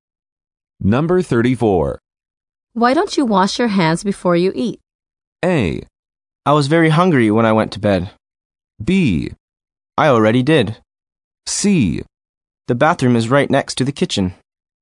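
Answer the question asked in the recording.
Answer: B: I already did.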